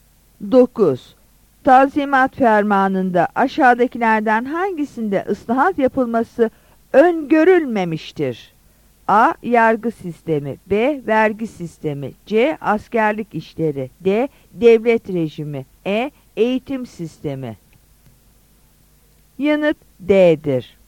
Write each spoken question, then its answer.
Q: Tanzimat fermanında aşağıdakilerden hangisinde ıslahat yapılması öngörülmemiştir?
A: Yanıt D'dir.